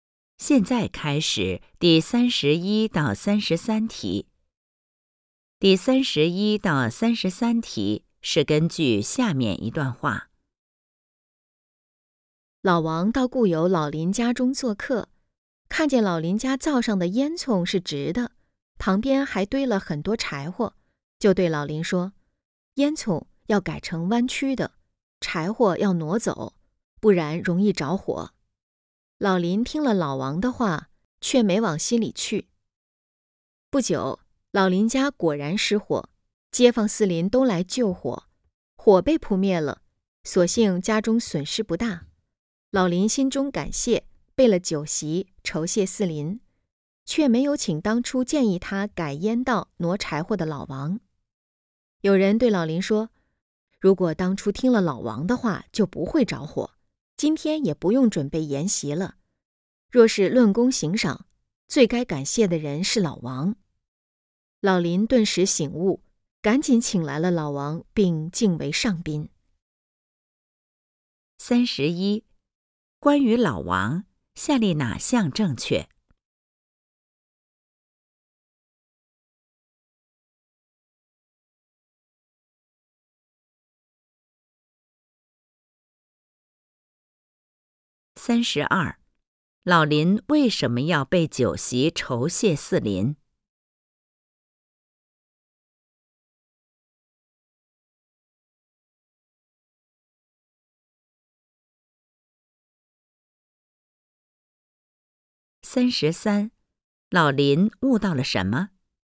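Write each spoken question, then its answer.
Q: 老林为什么要备酒席酬谢四邻?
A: 感谢四邻帮他救火

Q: 老林悟到了什么?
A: 最该感谢的是事先提醒他的老王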